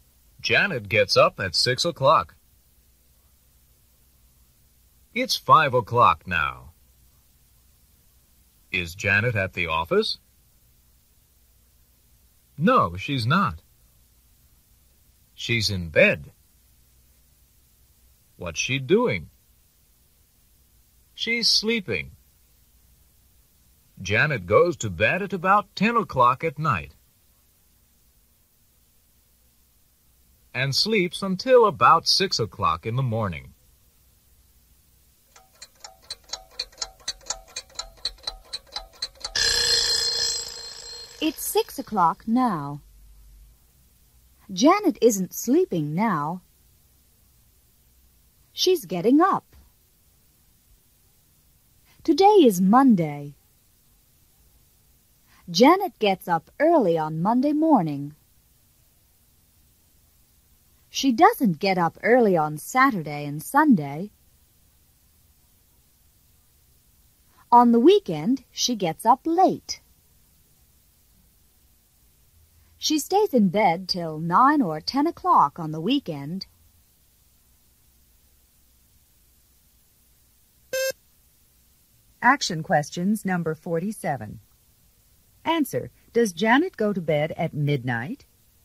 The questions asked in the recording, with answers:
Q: does Janet go to bed at midnight?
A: No, she doesn't.